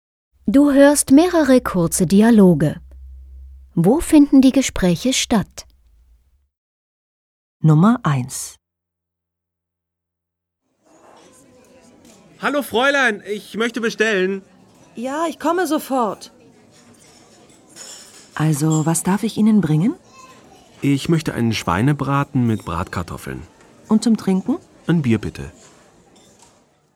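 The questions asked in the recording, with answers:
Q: Wo finden die Gespräche statt?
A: Im Restaurant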